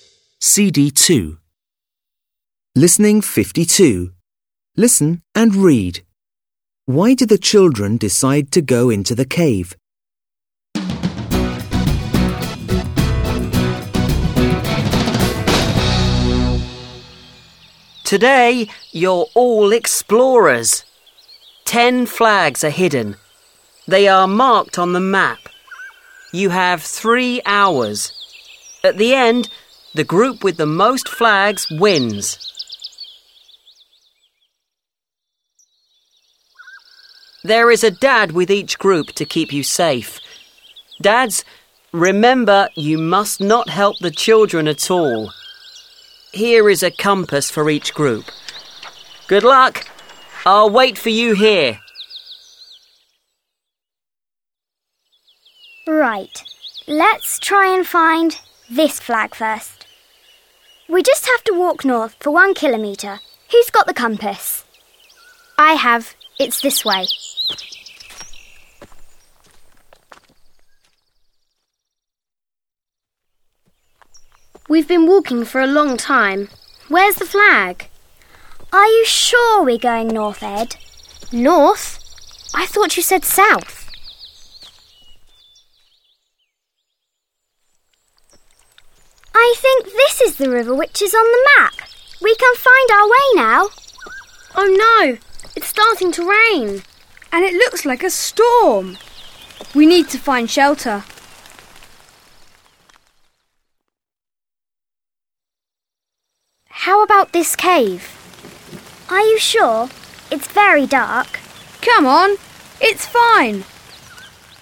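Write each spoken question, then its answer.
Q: Why did the children decide to go into the cave?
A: To find shelter because it started to rain and a storm was coming.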